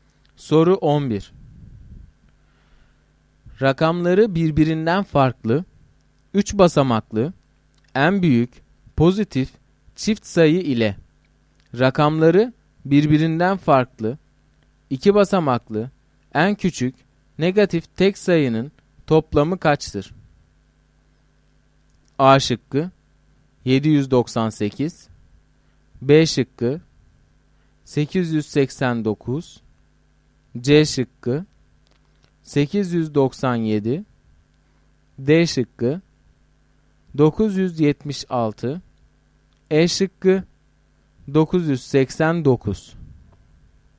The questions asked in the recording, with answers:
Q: Rakamları birbirinden farklı, 3 basamaklı, en büyük, pozitif, çift sayı ile rakamları birbirinden farklı, 2 basamaklı, en küçük, negatif tek sayının toplamı kaçtır?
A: Doğru cevap B şıkkı.